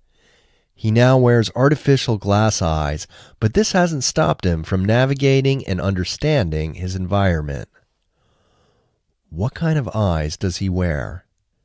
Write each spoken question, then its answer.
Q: What kind of eyes does he wear?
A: He wears artificial eyes.